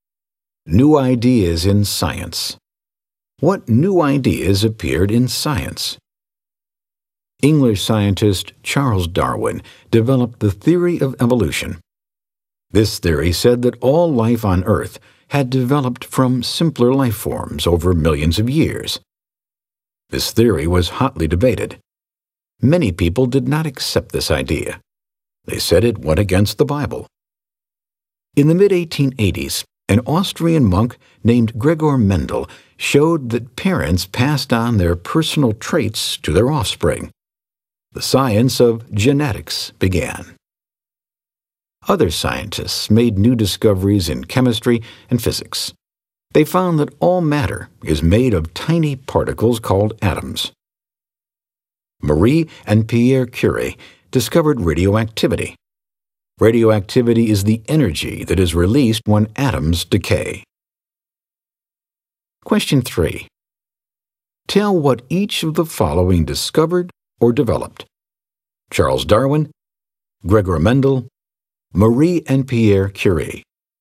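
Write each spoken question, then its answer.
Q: Tell what each of the following discovered or developed. Charles Darwin, Gregor Mendel, Marie and Pierre Curie.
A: Darwin: theory of evolution; Mendel: parents pass traits to offspring (genetics); Curies: radioactivity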